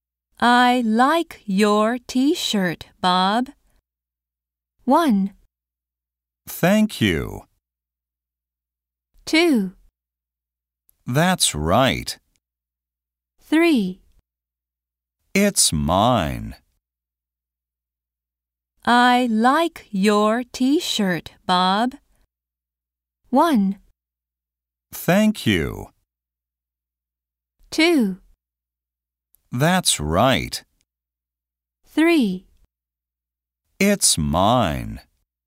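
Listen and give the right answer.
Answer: 1: Thank you.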